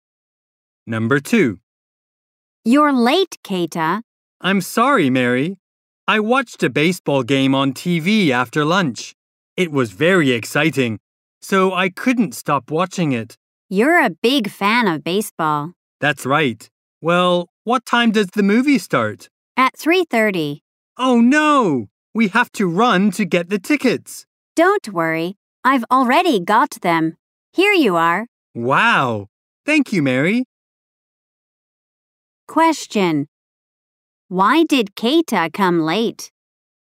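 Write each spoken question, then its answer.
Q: Why did Keita come late?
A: He watched a baseball game on TV and couldn't stop watching it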